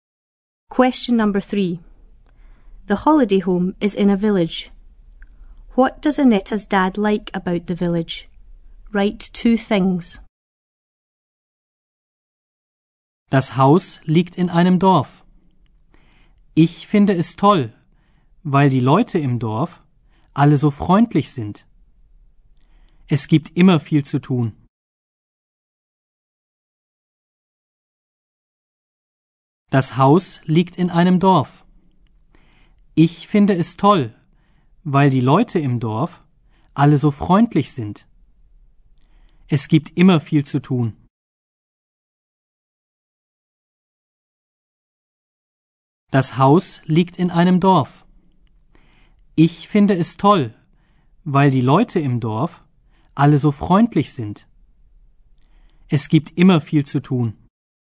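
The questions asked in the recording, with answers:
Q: What does Annette's dad like about the village?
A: The people are all so friendly; there is always a lot to do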